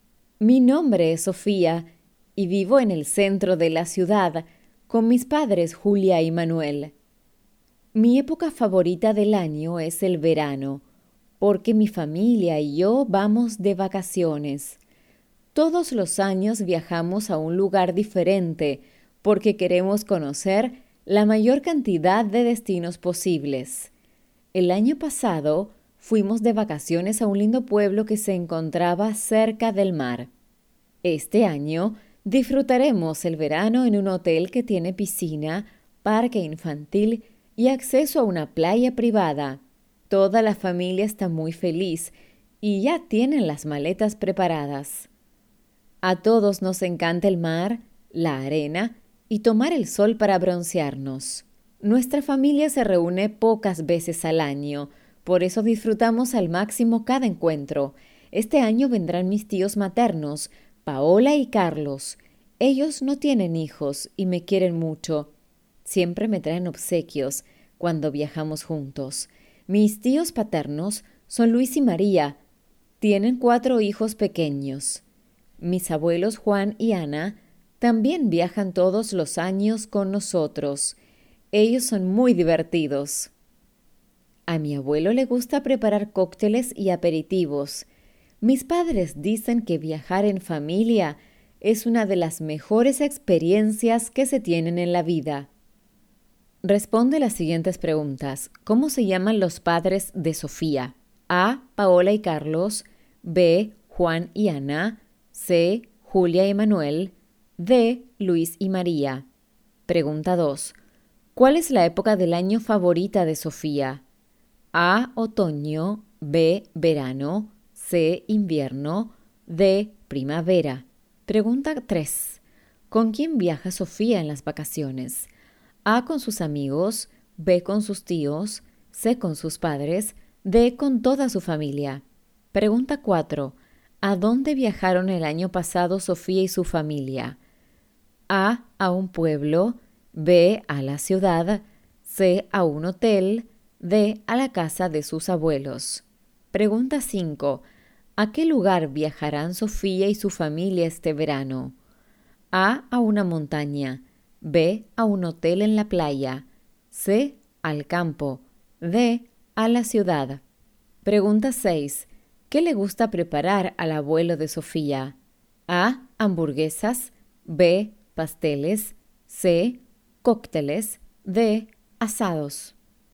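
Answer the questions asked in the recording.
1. C: Julia y Manuel
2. B: Verano
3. D: Con toda su familia
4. A: A un pueblo
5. B: A un hotel en la playa
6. C: Cócteles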